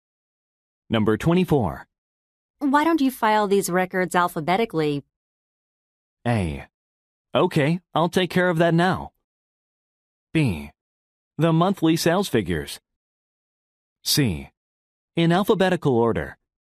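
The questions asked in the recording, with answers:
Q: Why don't you file these records alphabetically?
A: A: Okay, I'll take care of that now.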